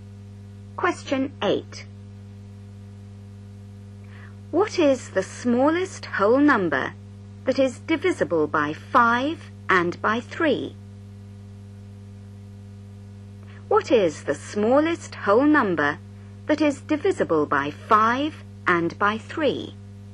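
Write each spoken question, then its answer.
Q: What is the smallest whole number that is divisible by 5 and by 3?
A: 15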